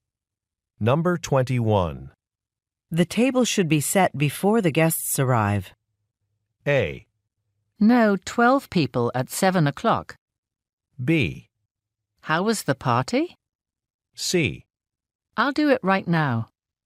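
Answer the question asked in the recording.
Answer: C: I'll do it right now.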